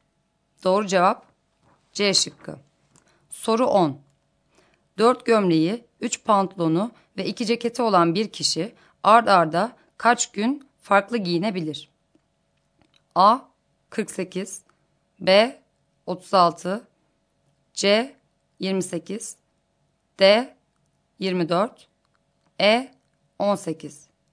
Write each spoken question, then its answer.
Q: 4 gömleği, 3 pantolonu ve 2 ceketi olan bir kişi ard arda kaç gün farklı giyinebilir?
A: Doğru cevap D şıkkı.